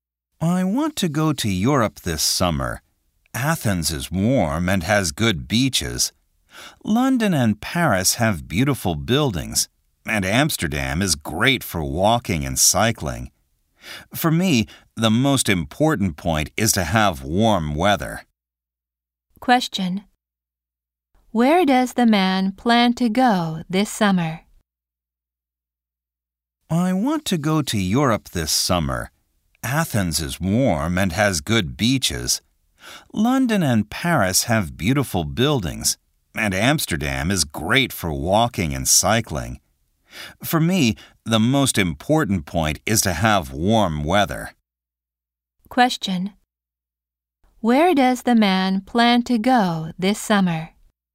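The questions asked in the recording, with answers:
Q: Where does the man plan to go this summer?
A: Athens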